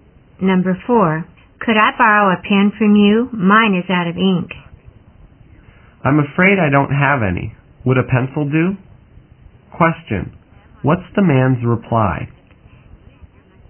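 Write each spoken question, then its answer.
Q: What's the man's reply?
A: He has no pen but offers a pencil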